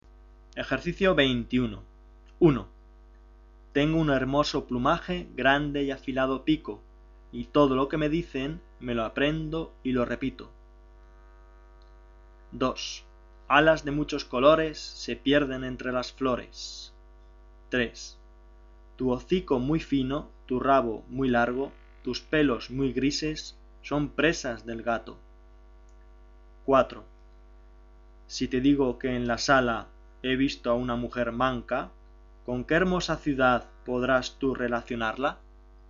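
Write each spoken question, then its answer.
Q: Tengo un hermoso plumaje, grande y afilado pico, y todo lo que me dicen me lo aprendo y lo repito.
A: el loro

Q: Alas de muchos colores se pierden entre las flores.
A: la mariposa

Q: Tu hocico muy fino, tu rabo muy largo, tus pelos muy grises son presas del gato.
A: el ratón

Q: Si te digo que en la sala he visto a una mujer manca, ¿con qué hermosa ciudad podrás tú relacionarla?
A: Salamanca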